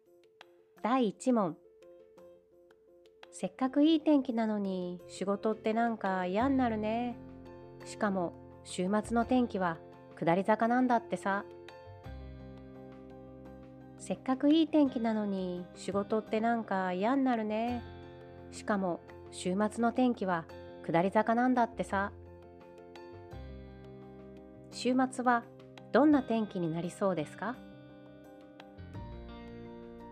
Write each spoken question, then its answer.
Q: 週末はどんな天気になりそうですか?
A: つまり、今いい天気なので、週末は天気が悪くなる。曇りか、もしかすると雨かもしれないです。